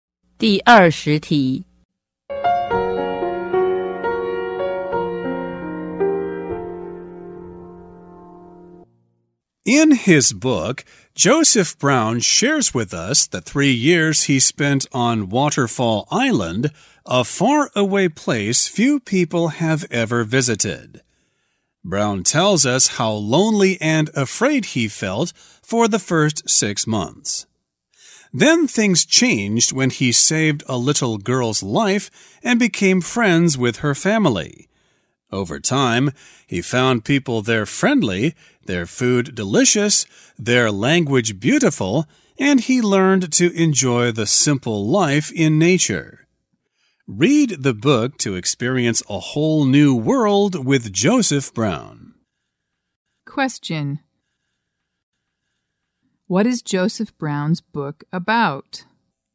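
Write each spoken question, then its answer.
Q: What is Joseph Brown's book about?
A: His three years living on Waterfall Island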